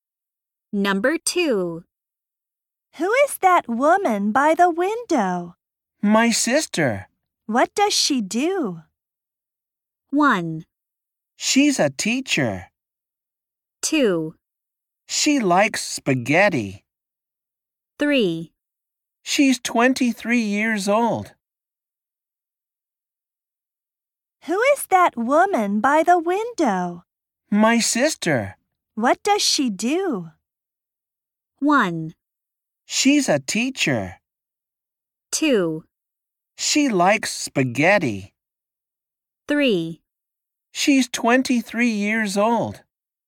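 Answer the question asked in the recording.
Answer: 1: She's a teacher.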